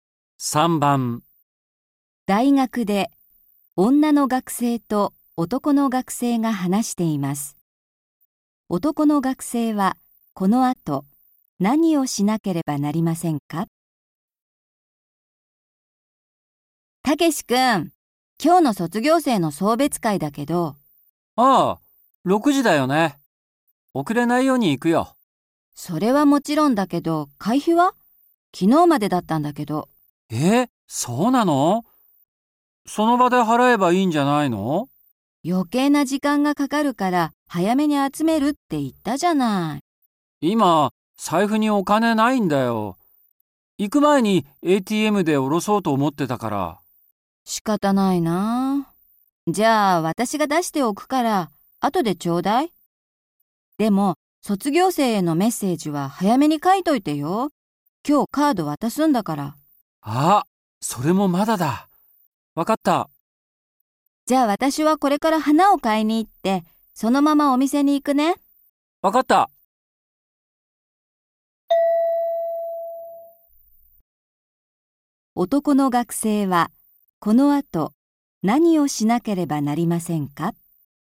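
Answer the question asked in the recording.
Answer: 卒業生へのメッセージをカードに書く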